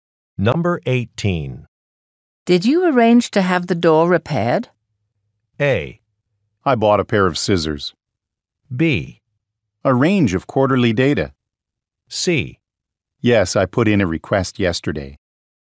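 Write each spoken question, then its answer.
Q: Did you arrange to have the door repaired?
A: C: Yes, I put in a request yesterday.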